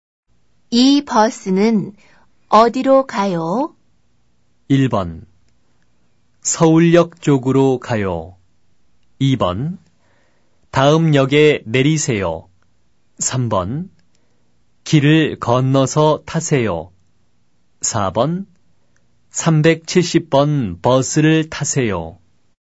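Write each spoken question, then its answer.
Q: 이 버스는 어디로 가요?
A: 1: 서울역 쪽으로 가요.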